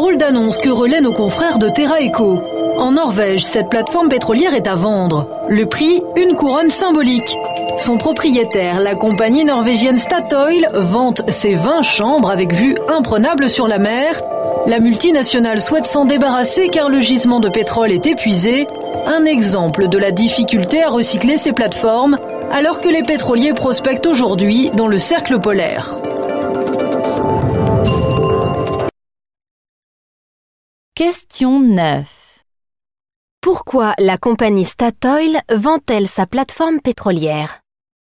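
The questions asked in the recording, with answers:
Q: Pourquoi la compagnie Statoil vend-elle sa plateforme pétrolière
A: Parce que le gisement de pétrole est épuisé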